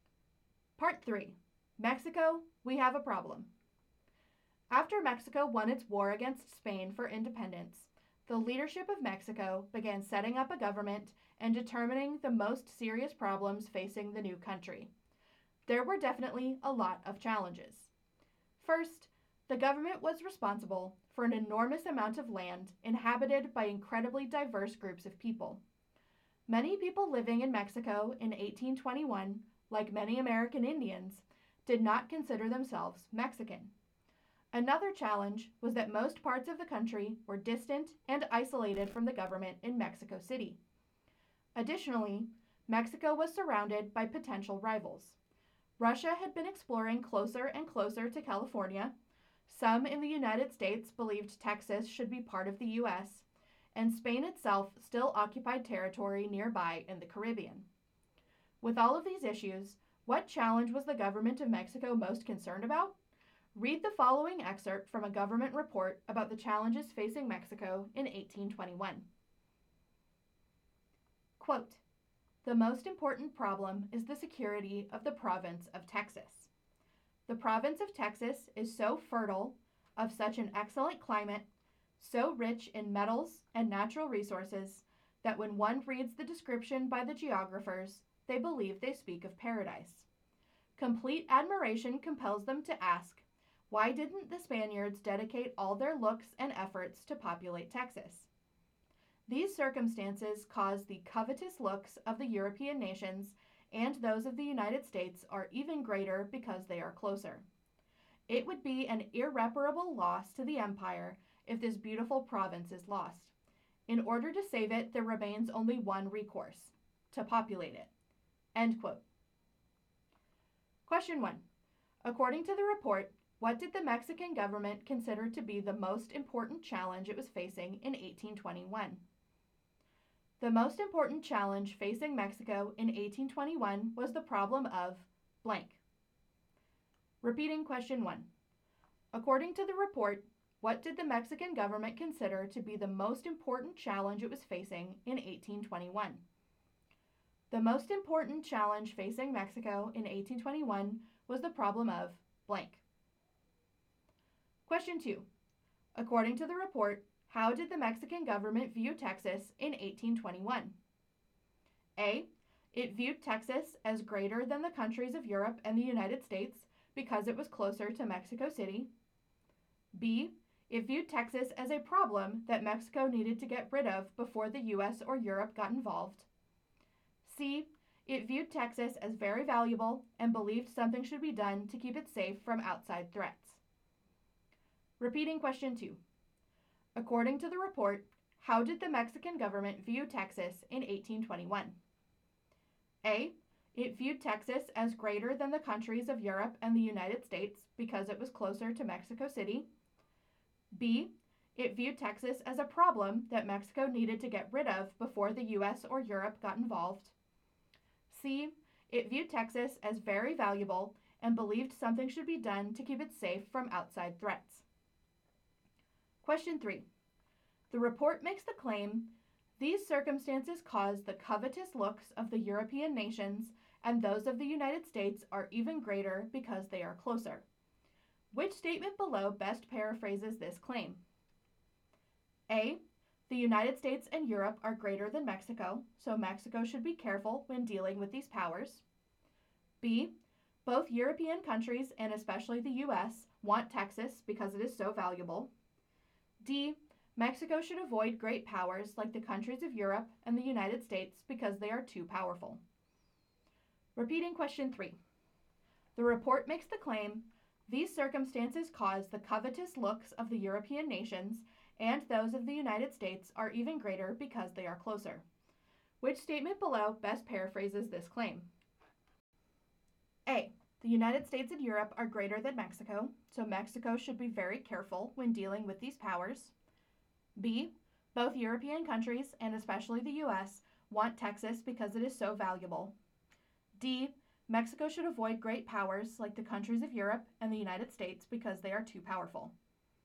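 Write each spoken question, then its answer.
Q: According to the report, what did the Mexican government consider to be the most important challenge it was facing in 1821?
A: the security of the province of Texas

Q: According to the report, how did the Mexican government view Texas in 1821?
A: C: It viewed Texas as very valuable and believed something should be done to keep it safe from outside threats.

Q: Which statement below best paraphrases this claim?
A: B: Both European countries, and especially the U.S., want Texas because it is so valuable.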